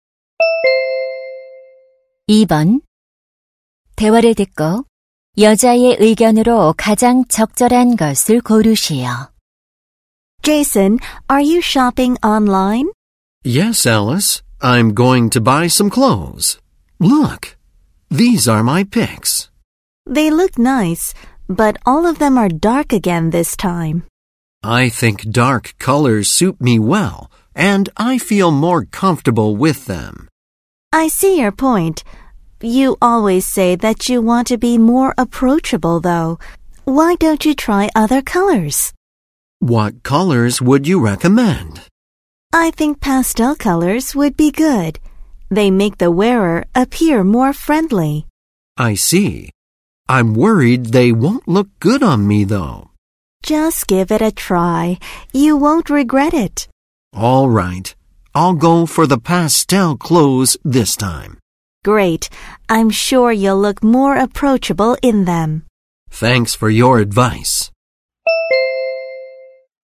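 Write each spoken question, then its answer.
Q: 대화를 듣고 여자의 의견으로 가장 적절한 것을 고르시오.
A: 더 친근해 보이려면 밝은 파스텔 색 옷을 입어 보는 것이 좋다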